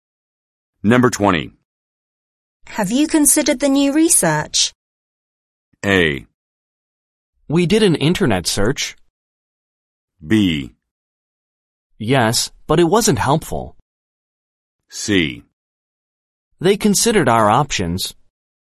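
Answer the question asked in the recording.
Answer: B: Yes, but it wasn't helpful.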